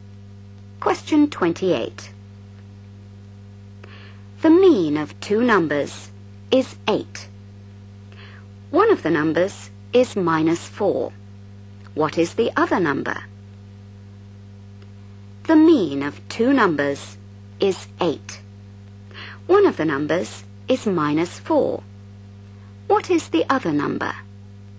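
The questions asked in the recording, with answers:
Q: What is the other number?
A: 20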